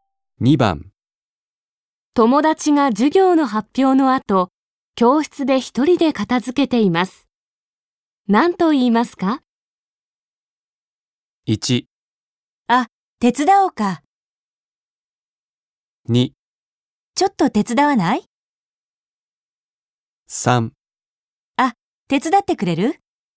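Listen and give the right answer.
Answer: 1: あ、手伝おうか。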